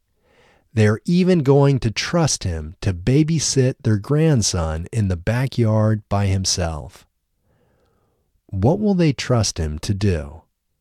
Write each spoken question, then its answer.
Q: What will they trust him to do?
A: They will trust him to babysit their grandson in the backyard by himself.